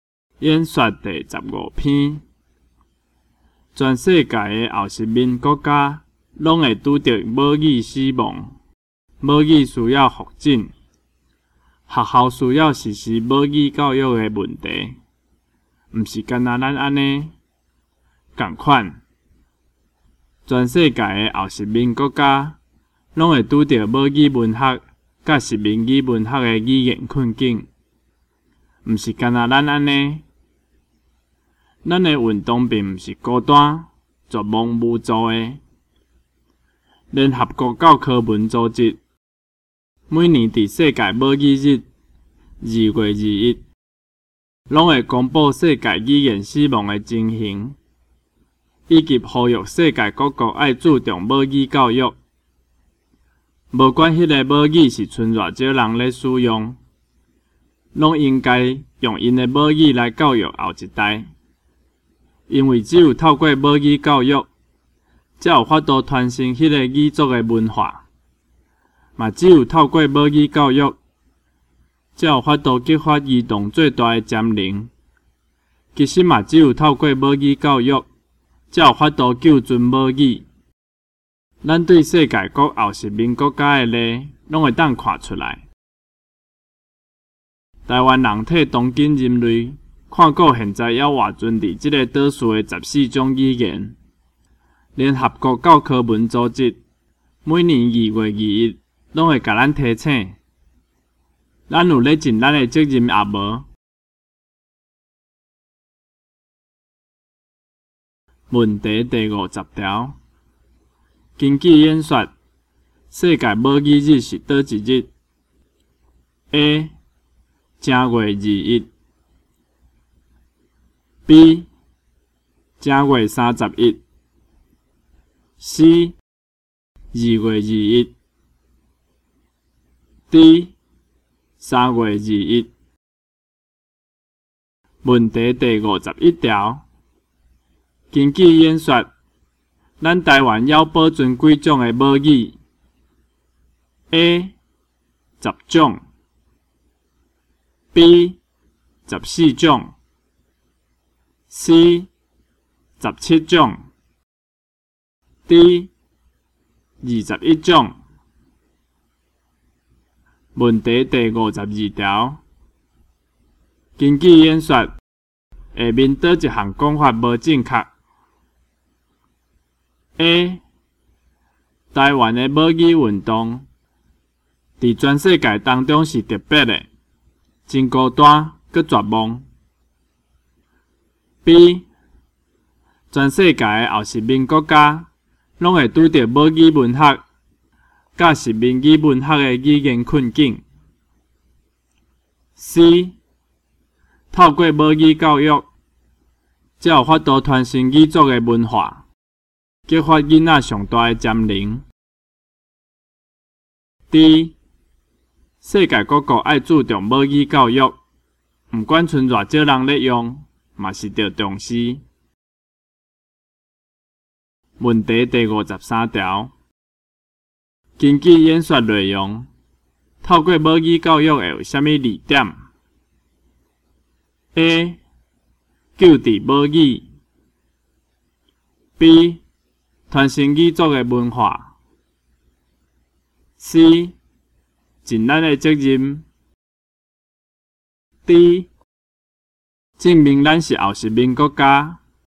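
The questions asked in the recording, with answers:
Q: 根据演说,咱台湾要保存几种的母语?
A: B: 14种

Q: 根据演说,下面哪一项讲法无正 确?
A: A: 台湾的母语运动在全世界当中是特别的,真孤单又绝望。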